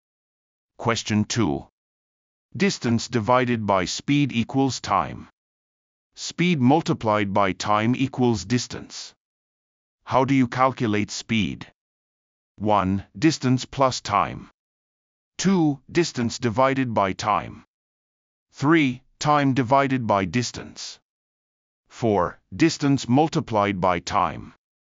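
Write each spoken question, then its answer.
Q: How do you calculate speed?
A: 2: Distance divided by time.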